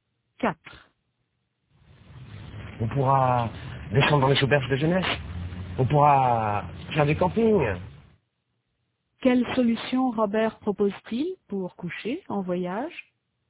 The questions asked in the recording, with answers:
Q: Quelle solution Robert propose-t-il pour coucher en voyage?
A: Il propose de descendre dans les auberges de jeunesse ou de faire du camping.